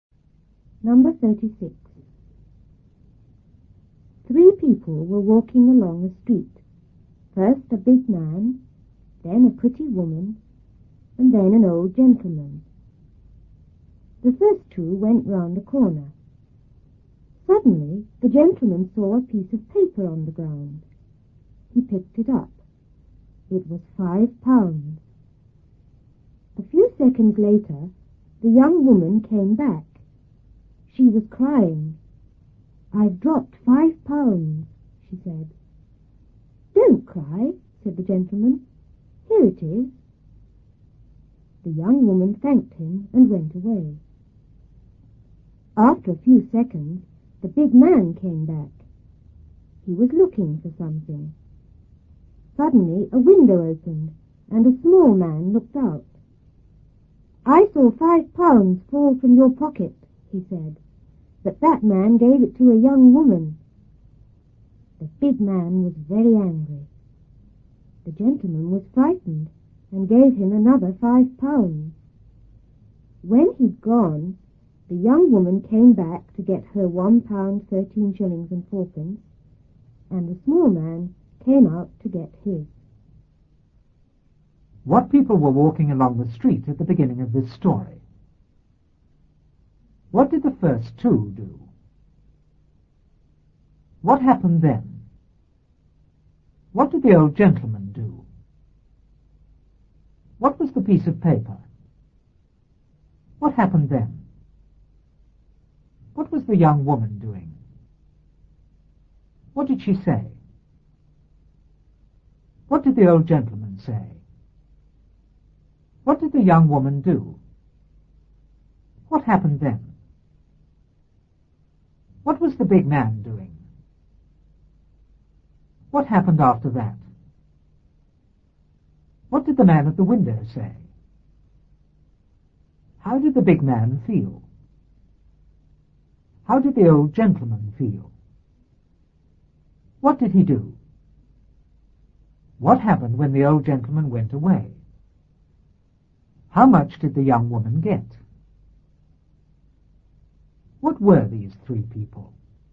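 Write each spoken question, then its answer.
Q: What people were walking along the street at the beginning of this story?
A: A big man, a pretty woman and an old gentleman

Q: What did the first two do?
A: They went round a corner

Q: What did the old gentleman do?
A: He saw a piece of paper on the ground and picked it up

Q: What was the young woman doing?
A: Crying

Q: What did she say?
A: "I've dropped £5"

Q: What did the old gentleman say?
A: "Don't cry. Here it is."

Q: What did the young woman do?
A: She thanked him and went away

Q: What was the big man doing?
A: Looking for something

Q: What happened after that?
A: A window opened and a small man looked out

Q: What did the man at the window say?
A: He saw £5 fall from the big man's pocket, but that man gave it to a young woman

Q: How did the big man feel?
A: Very angry

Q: How did the old gentleman feel?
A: Frightened

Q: What did he do?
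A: He gave the big man another £5

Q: What happened when the old gentleman went away?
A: The young woman came back to get her share, and the small man came out to get his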